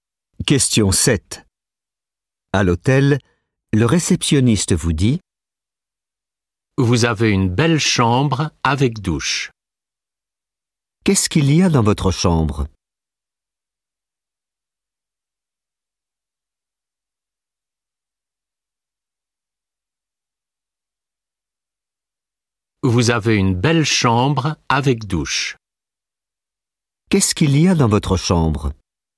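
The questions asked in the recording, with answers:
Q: Qu'est-ce qu'il y a dans votre chambre ?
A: Une douche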